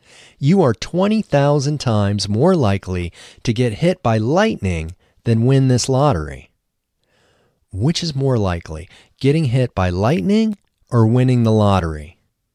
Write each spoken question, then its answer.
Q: Which is more likely, getting hit by lightning or winning the lottery?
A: Getting hit by lightning is much more likely than winning the lottery.